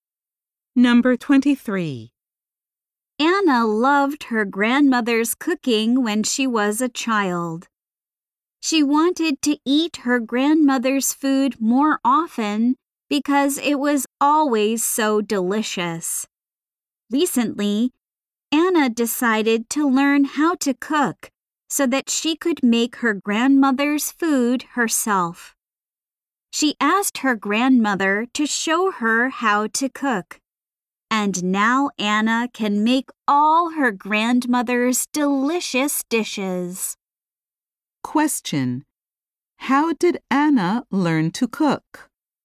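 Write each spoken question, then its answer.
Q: How did Anna learn to cook?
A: Her grandmother showed her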